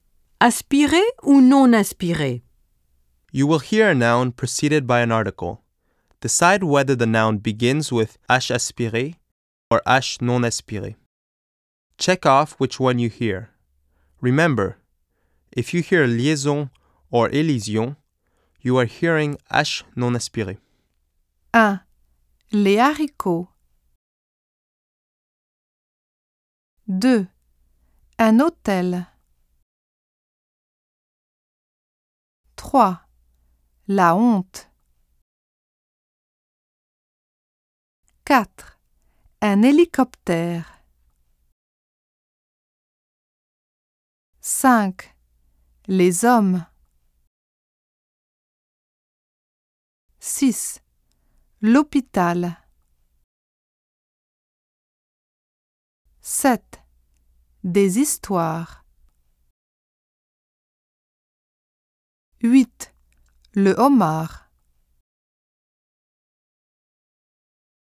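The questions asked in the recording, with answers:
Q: Les haricots.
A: H aspiré

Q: Un hôtel.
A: H non aspiré

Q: La honte.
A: H aspiré

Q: Un hélicoptère.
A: H non aspiré

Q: Les hommes.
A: H non aspiré

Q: L'hôpital.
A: H non aspiré

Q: Des histoires.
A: H non aspiré

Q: Le homard.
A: H aspiré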